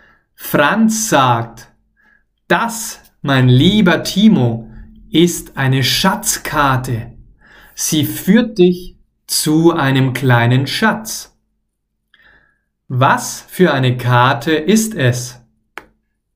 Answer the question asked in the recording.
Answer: Eine Schatzkarte. Es ist eine Schatzkarte.